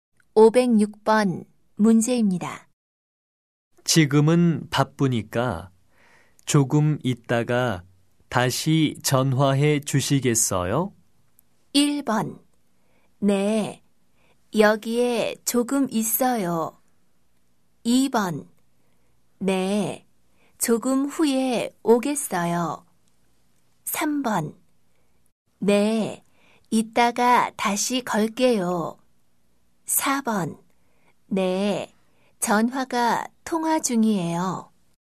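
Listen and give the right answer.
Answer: 3: 네, 이따가 다시 걸게요.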